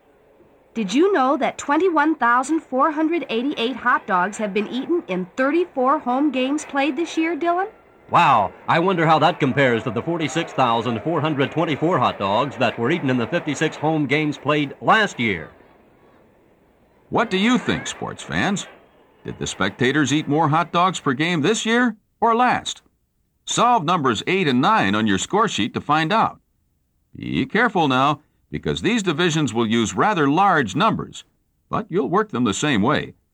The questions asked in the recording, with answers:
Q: Did the spectators eat more hot dogs per game this year or last?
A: The mustard crowd this year has consumed 632 francs per game.

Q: Did the spectators eat more hot dogs per game this year or last?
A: But last year, the total was 829 hot dogs per game.